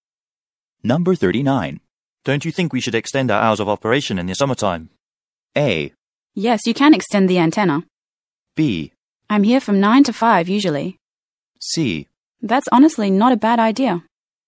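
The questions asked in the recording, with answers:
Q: Don't you think we should extend our hours of operation in the summertime?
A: C: That's honestly not a bad idea.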